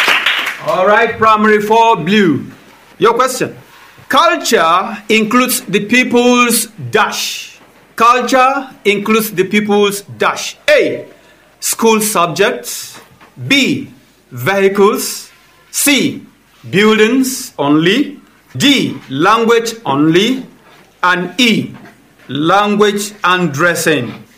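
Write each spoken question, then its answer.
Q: Culture includes the people's dash.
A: E: language and dressing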